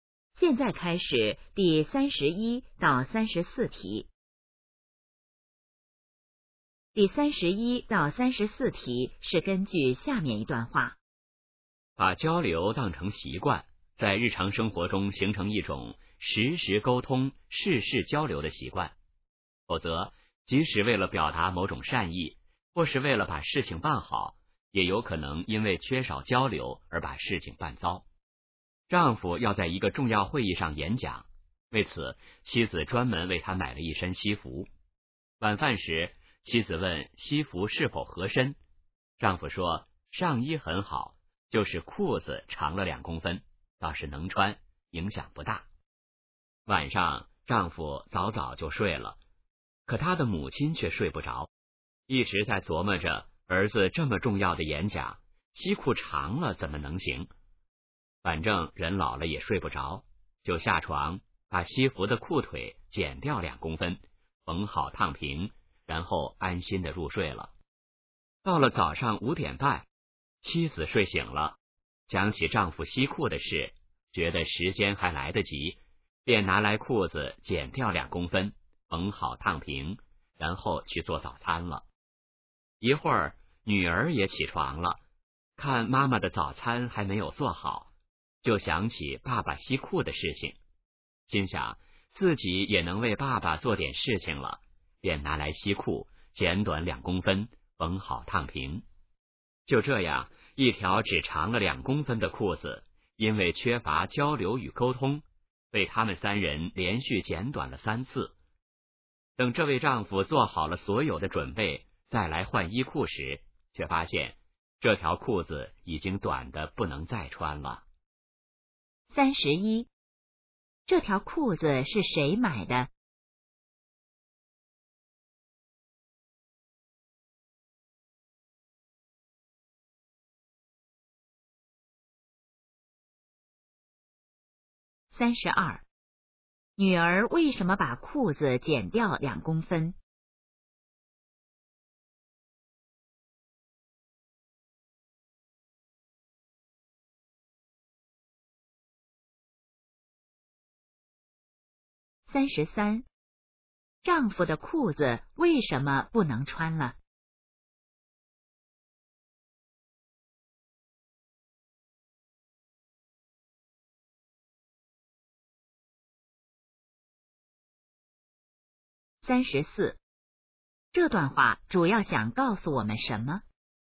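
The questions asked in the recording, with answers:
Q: 这条裤子是谁买的?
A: 妻子

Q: 女儿为什么把裤子剪掉2公分?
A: 想为爸爸做点事情

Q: 丈夫的裤子为什么不能穿了?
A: 被连续剪短了3次,太短了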